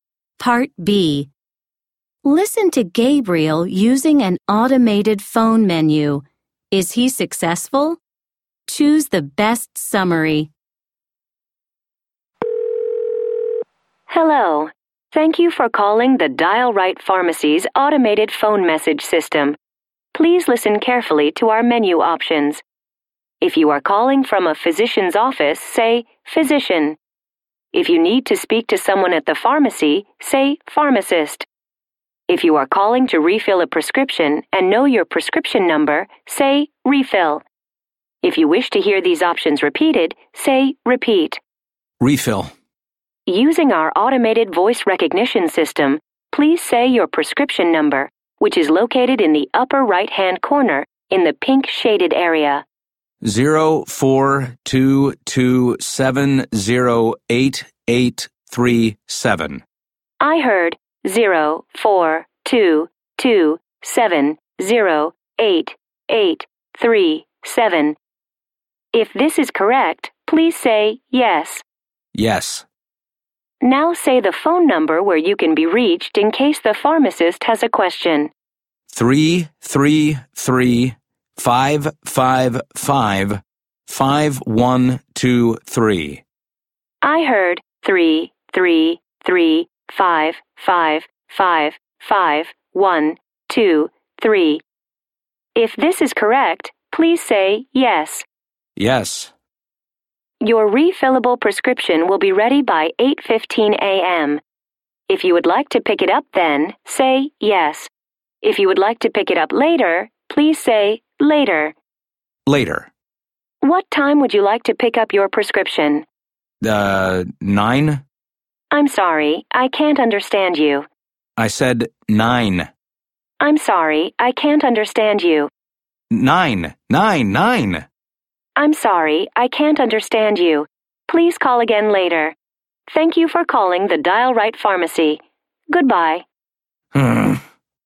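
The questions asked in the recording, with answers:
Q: Is he successful?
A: No, only partly: the refill request works, but the system can't understand his pickup time, so he has to call again later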